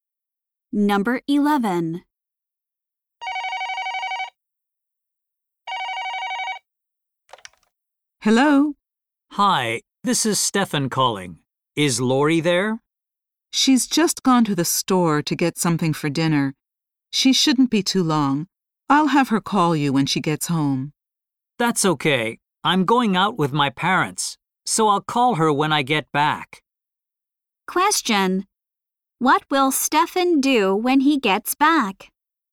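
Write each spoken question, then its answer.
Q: What will Stefan do when he gets back?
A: Call Lori.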